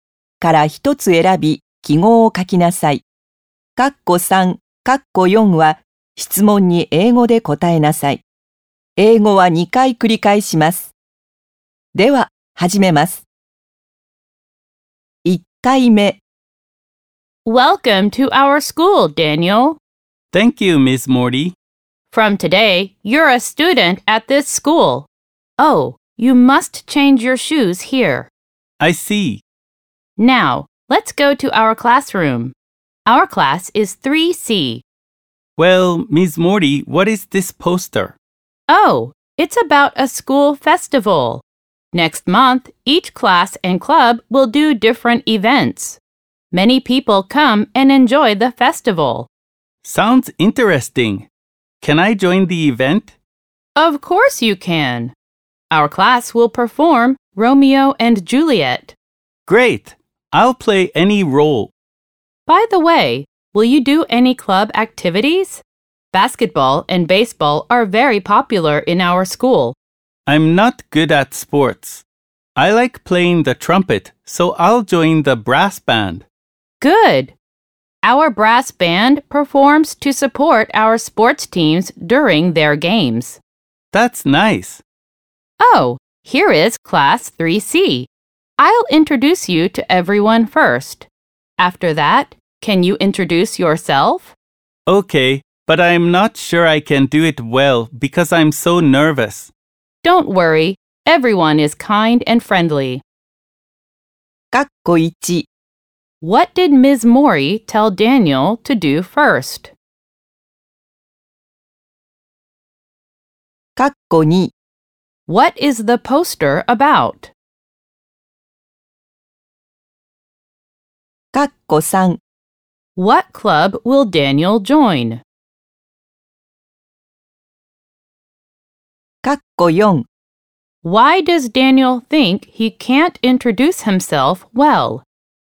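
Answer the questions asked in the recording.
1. Change his shoes
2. A school festival
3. The brass band
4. Because he is so nervous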